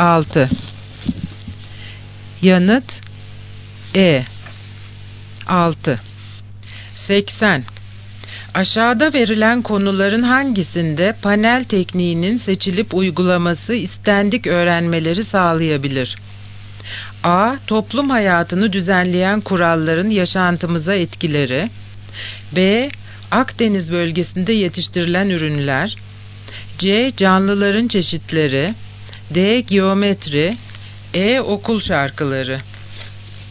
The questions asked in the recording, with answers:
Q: Aşağıda verilen konuların hangisinde panel tekniğinin seçilip uygulaması istendik öğrenmeleri sağlayabilir?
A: Yanıt A. Toplum hayatını düzenleyen kuralların yaşantımıza etkileri.